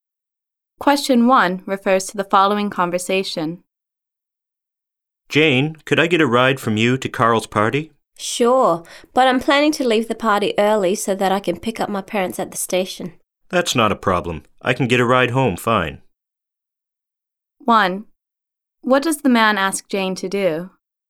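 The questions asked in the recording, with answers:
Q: What does the man ask Jane to do?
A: Give him a ride to Carl's party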